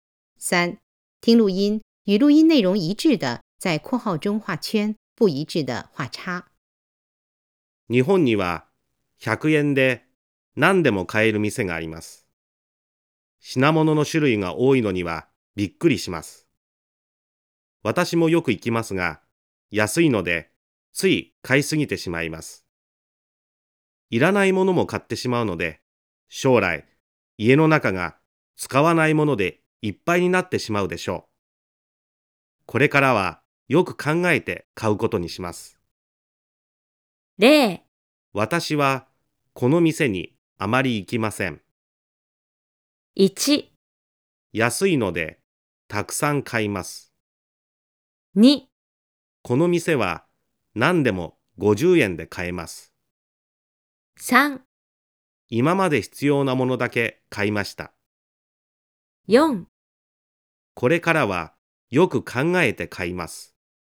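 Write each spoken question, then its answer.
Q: 安いのでたくさん買います。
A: ○(正しい)

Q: この店は何でも50円で買えます。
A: ×(100円で買える)

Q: 今まで必要なものだけ買いました。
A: ×(いらないものも買ってしまう)

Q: これからはよく考えて買います。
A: ○(正しい)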